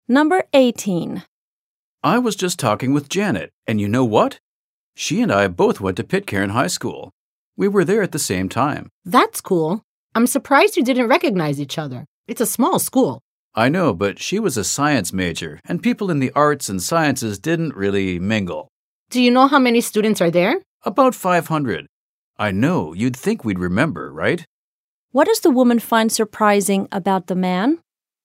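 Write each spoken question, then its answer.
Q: What does the woman find surprising about the man?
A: That he and Janet didn't recognize each other, though they went to the same small high school at the same time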